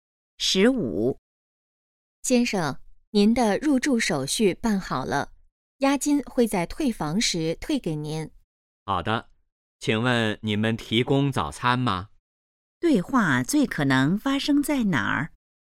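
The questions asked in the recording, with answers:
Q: 对话最可能发生在哪儿?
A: 酒店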